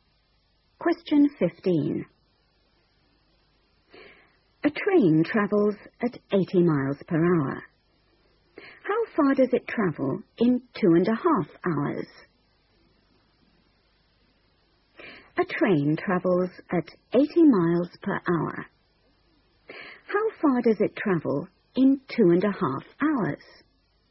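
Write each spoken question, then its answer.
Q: How far does it travel in 2.5 hours?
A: 200 miles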